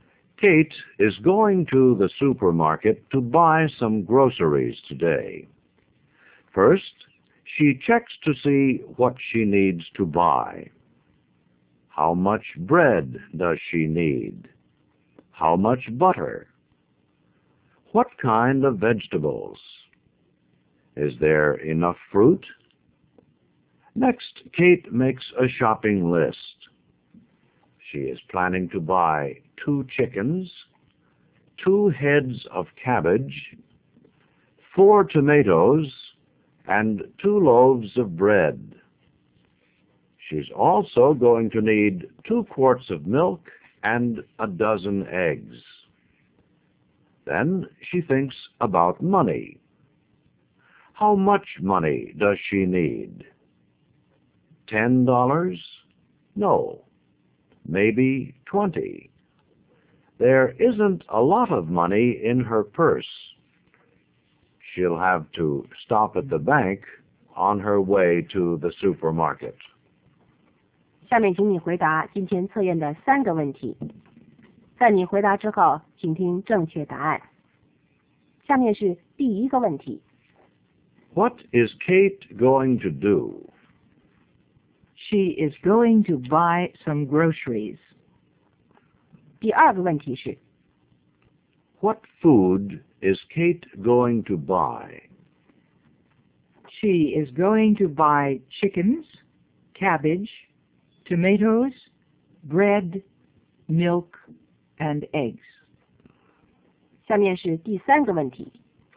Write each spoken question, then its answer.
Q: What is Kate going to do?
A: She is going to buy some groceries.

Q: What food is Kate going to buy?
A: She is going to buy chickens, cabbage, tomatoes, bread, milk, and eggs.